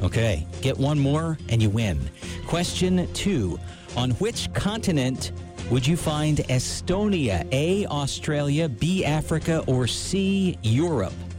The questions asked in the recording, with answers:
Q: On which continent would you find Estonia? A, Australia, B, Africa, or C, Europe?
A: Europe.